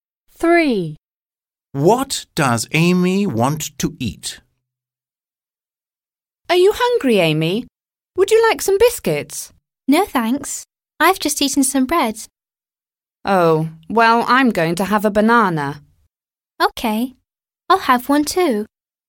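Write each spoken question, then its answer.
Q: What does Amy want to eat?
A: A banana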